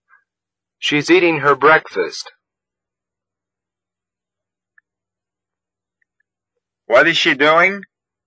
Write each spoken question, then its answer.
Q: What is she doing?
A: She is eating her breakfast.